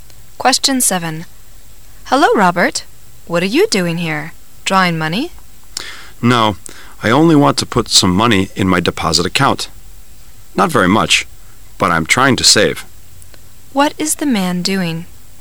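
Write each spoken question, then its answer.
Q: What is the man doing?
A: Putting some money into his deposit account (saving).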